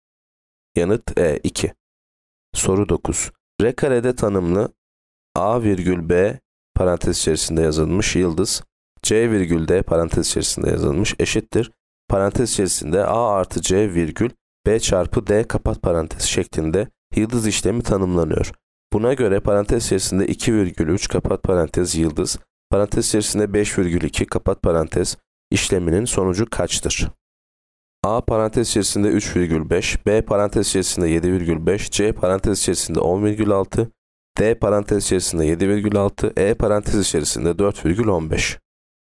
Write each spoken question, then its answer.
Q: Buna göre parantez içerisinde 2 virgül 3 kapat parantez yıldız, parantez içerisinde 5 virgül 2 kapat parantez işleminin sonucu kaçtır?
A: Yanıt D parantez içerisinde 7 virgül 6.